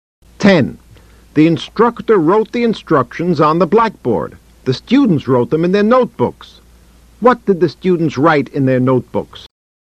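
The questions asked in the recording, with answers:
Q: What did the students write in their notebooks?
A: The instructions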